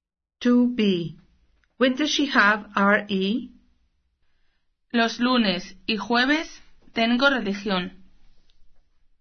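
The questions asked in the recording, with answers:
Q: When does she have RE?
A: Mondays and Thursdays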